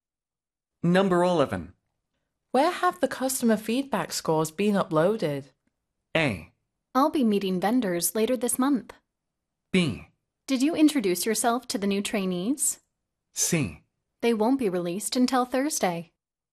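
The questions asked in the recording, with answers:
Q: Where have the customer feedback scores been uploaded?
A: C: They won't be released until Thursday.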